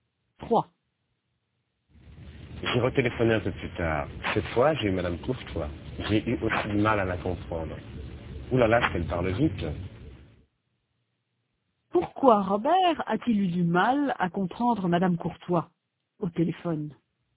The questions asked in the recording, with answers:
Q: Pourquoi Robert a-t-il eu du mal à comprendre Madame Courtois au téléphone?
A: Parce qu'elle parle vite.